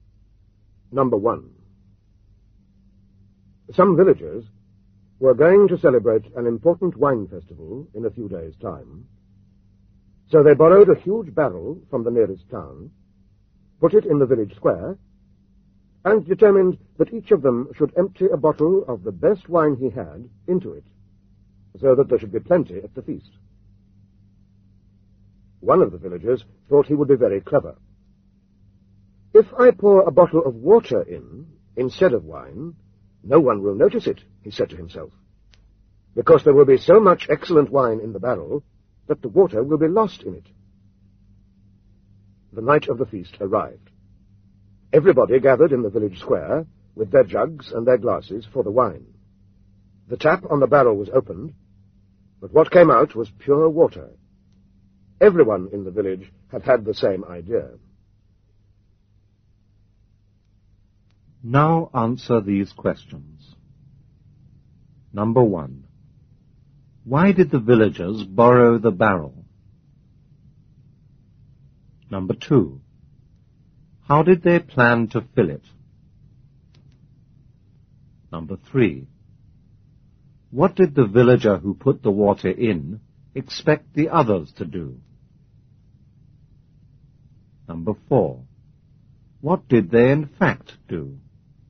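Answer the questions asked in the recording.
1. To hold wine for an important wine festival
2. Each villager would pour a bottle of his best wine into it
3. To pour in wine, so his water would not be noticed
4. They all poured in water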